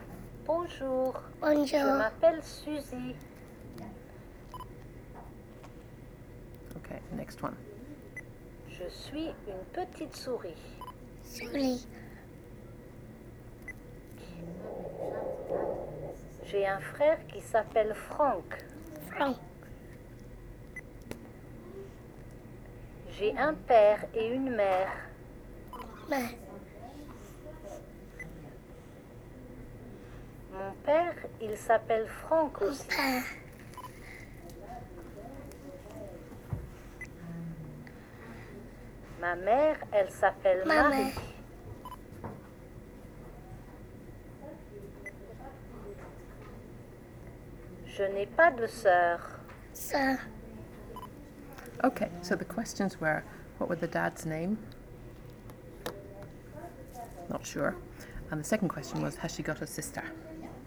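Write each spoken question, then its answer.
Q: what were the dad's name?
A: Franck

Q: has she got a sister?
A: No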